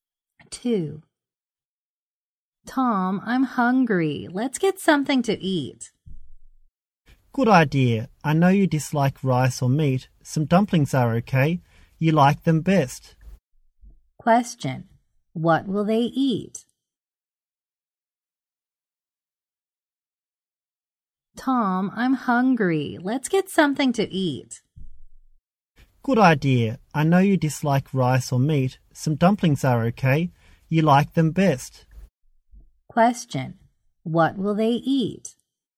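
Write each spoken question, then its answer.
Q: What will they eat?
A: Dumplings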